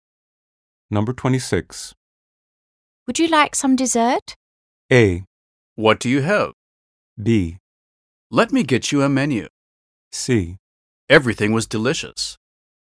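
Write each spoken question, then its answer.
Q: Would you like some dessert?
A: A: What do you have?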